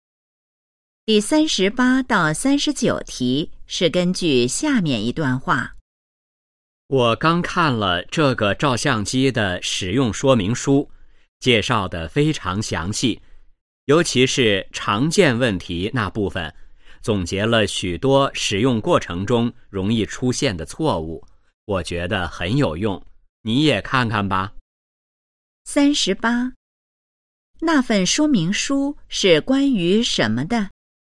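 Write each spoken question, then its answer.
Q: 那份说明书是关于什么的?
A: 照相机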